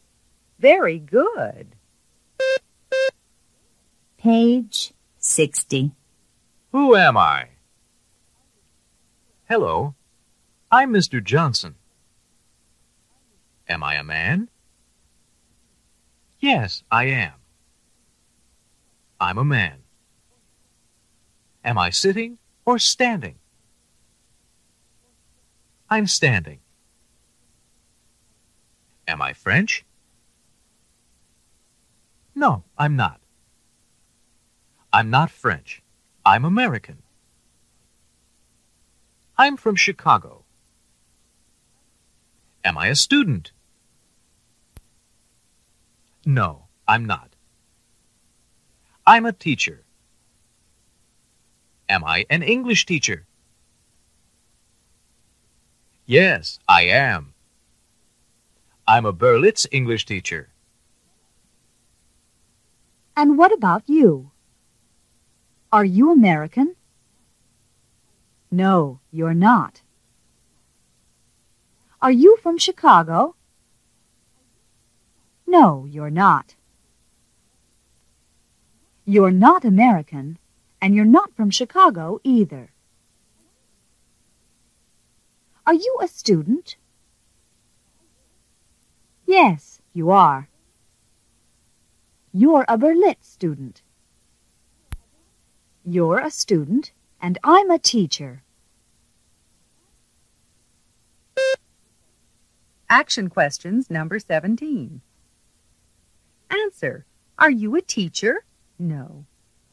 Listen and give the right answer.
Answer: No, I'm not.